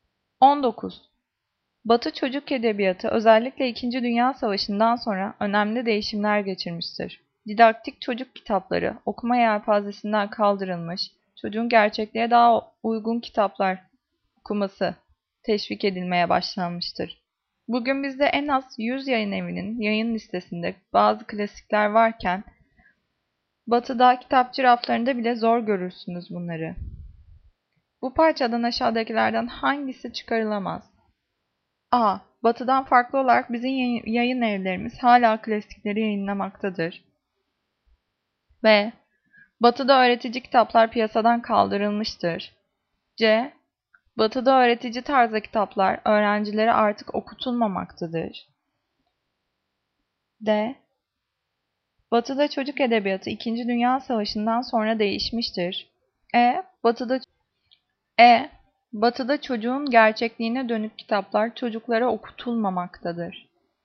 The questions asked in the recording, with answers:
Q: Bu parçadan aşağıdakilerden hangisi çıkarılamaz?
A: Cevap E. Batı'da çocuğun gerçekliğine dönük kitaplar çocuklara okutulmamaktadır.